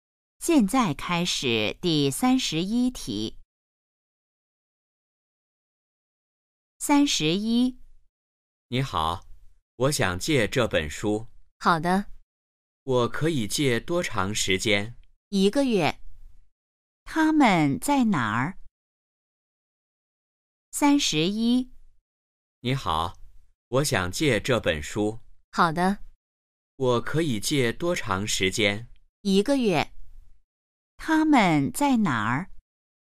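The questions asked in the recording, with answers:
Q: 他们在哪儿?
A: 图书馆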